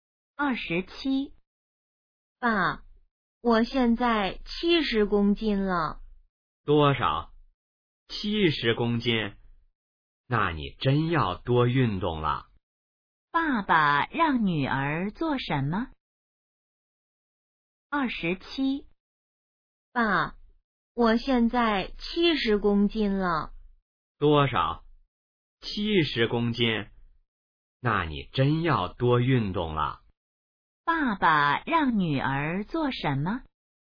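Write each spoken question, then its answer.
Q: 爸爸让女儿做什么?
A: 多运动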